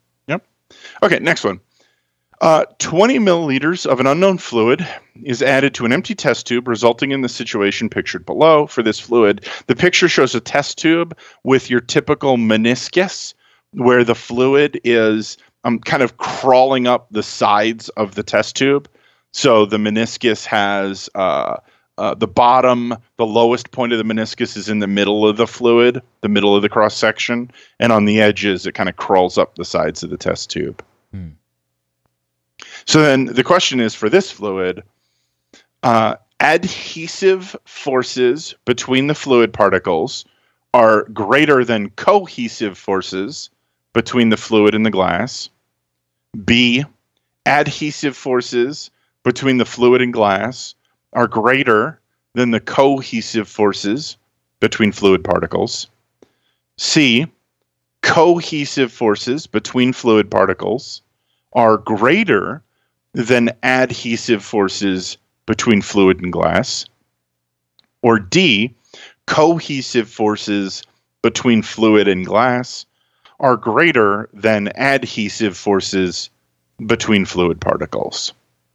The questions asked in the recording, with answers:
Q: So then the question is, for this fluid,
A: And so that would give us answer choice B.